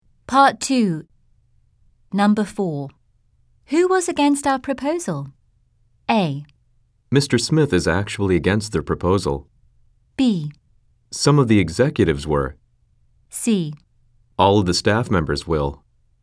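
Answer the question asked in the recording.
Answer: B: Some of the executives were.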